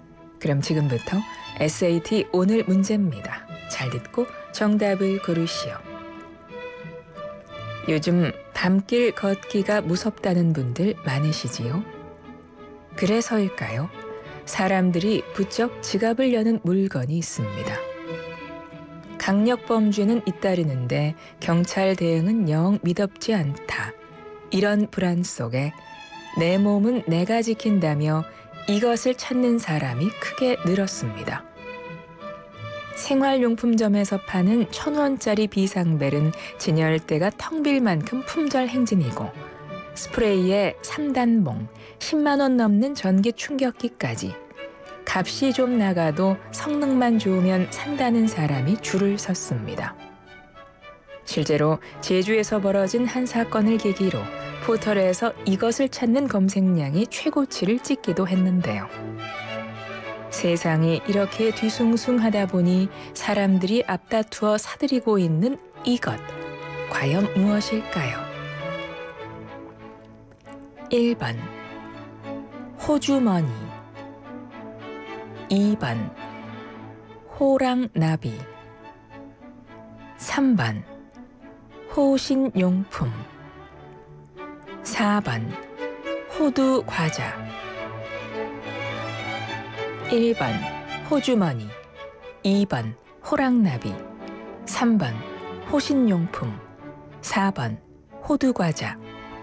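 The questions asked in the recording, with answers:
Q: 세상이 이렇게 뒤숭숭하다 보니 사람들이 앞다투어 사들이고 있는 이것, 과연 무엇일까요?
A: 3번: 호신용품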